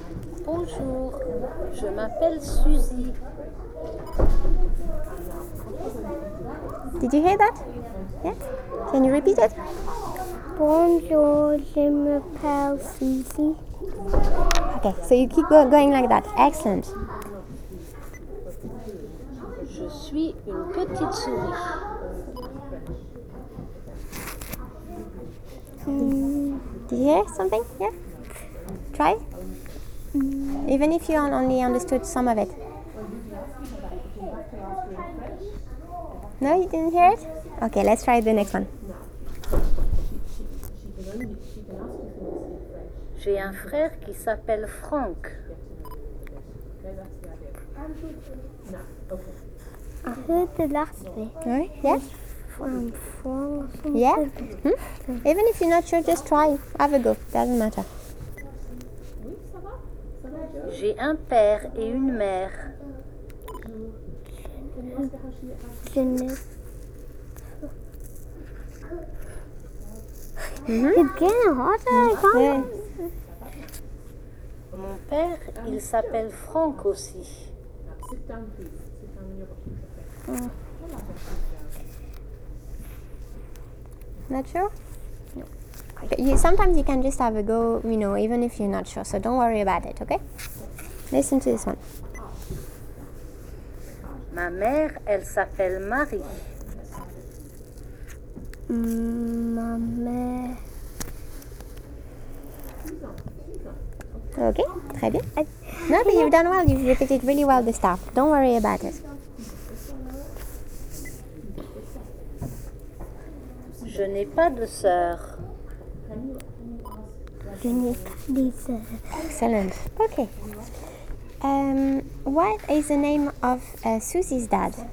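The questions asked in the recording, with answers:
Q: What is the name of Susie's dad?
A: Franck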